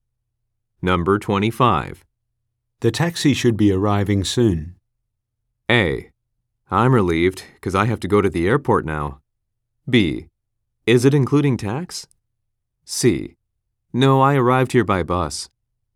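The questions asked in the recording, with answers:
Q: The taxi should be arriving soon.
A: A: I'm relieved, because I have to go to the airport now.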